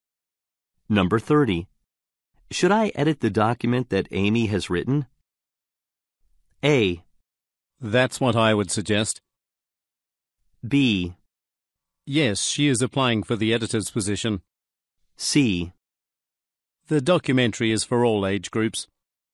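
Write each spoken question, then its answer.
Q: Should I edit the document that Amy has written?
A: A: That's what I would suggest.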